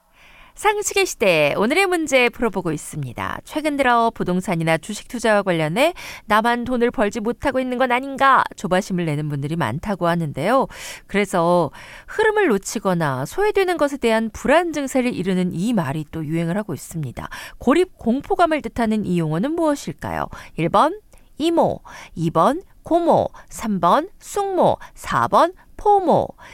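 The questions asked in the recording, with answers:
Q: 고립 공포감을 뜻하는 이 용어는 무엇일까요?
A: 4: 포모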